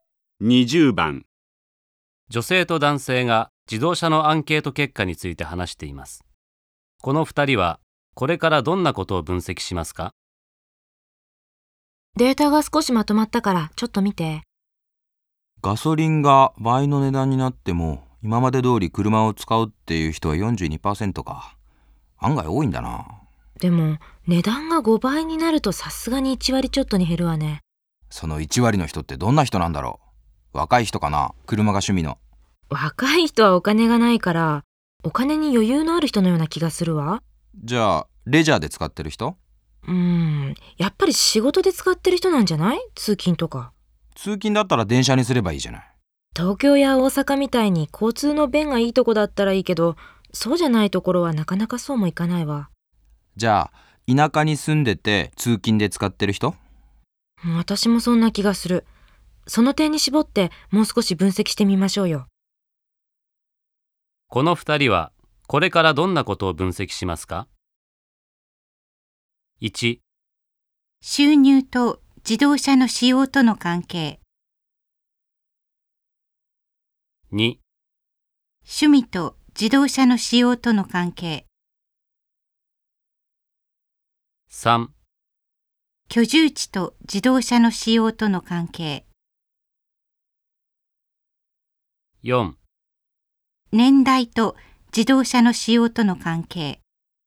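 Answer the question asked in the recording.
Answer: 3: 居住地と自動車の使用との関係。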